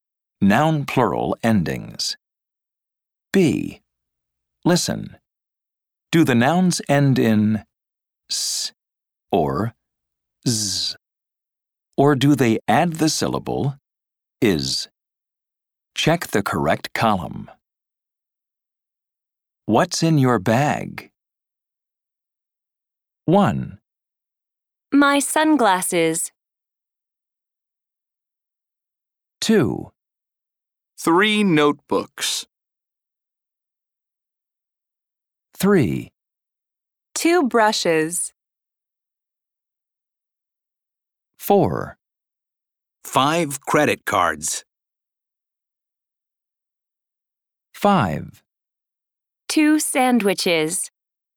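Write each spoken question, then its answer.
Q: My sunglasses.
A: adds the syllable is (/ɪz/)

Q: 2 brushes.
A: adds the syllable is (/ɪz/)

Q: 2 sandwiches.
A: adds the syllable is (/ɪz/)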